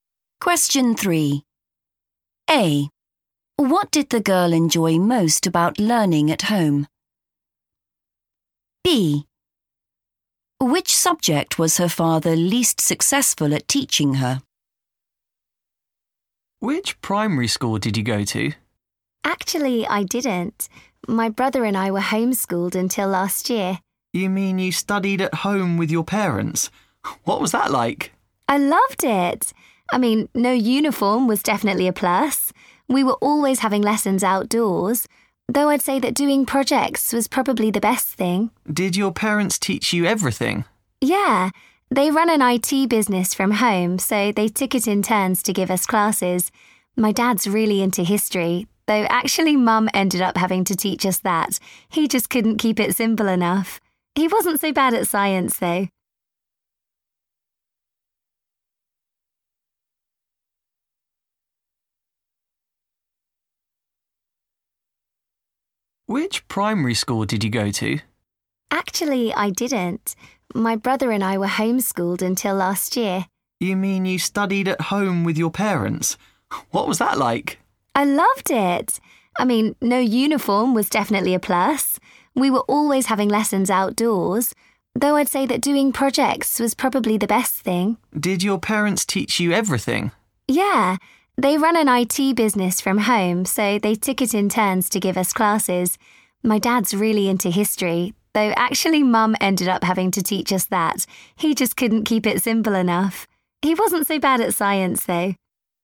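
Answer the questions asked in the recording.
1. doing projects
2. history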